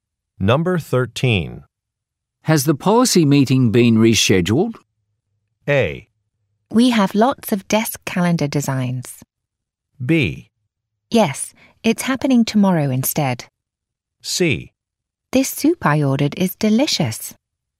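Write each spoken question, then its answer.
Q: Has the policy meeting been rescheduled?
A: B: Yes, it's happening tomorrow instead.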